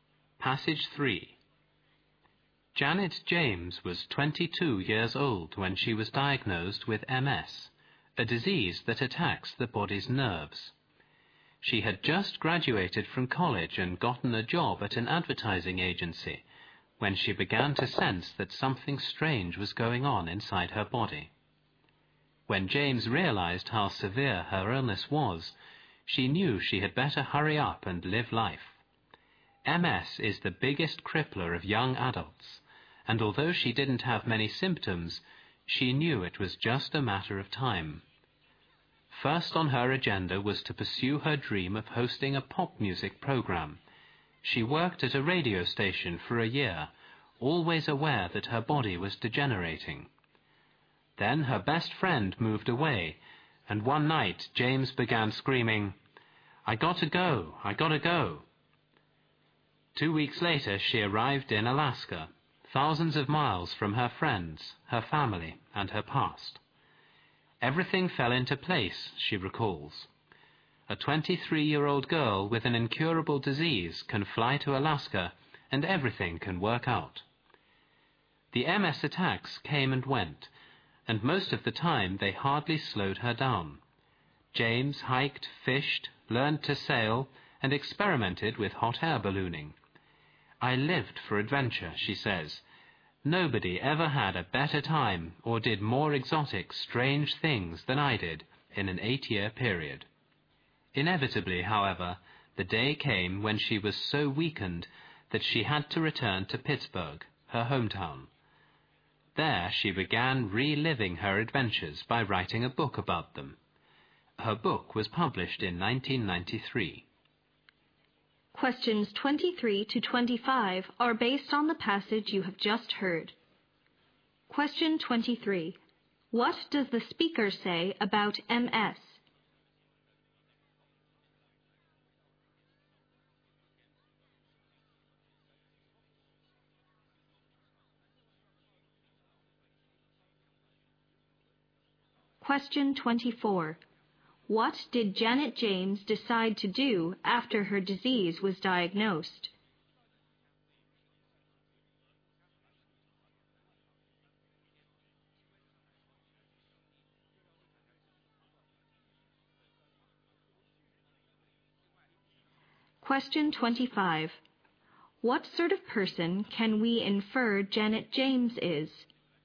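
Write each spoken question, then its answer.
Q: What does the speaker say about MS?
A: It is the biggest crippler of young adults.

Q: What did Janet James decide to do after her disease was diagnosed?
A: Hurry up and live life, starting with her dream of hosting a pop music program.

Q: What sort of person can we infer Janet James is?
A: Adventurous and optimistic.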